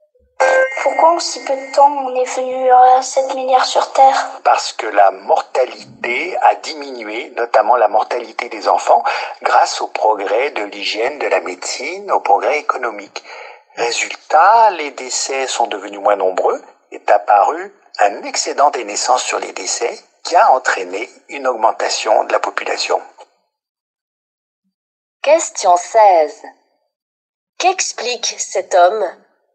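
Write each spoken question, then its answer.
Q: Qu'explique cet homme ?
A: Pourquoi la population mondiale a augmenté si vite (baisse de la mortalité)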